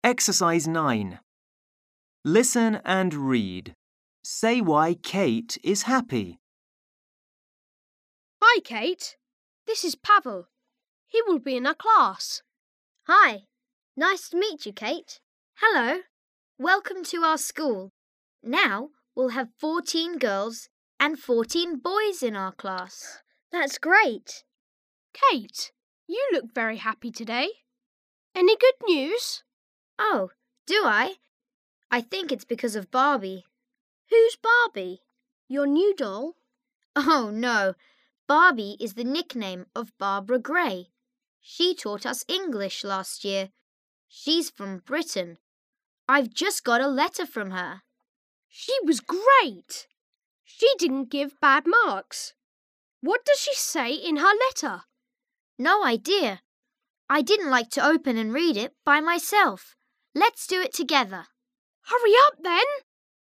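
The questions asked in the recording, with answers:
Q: Say why Kate is happy.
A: Because she has just got a letter from Barbie (Barbara Gray), her former English teacher.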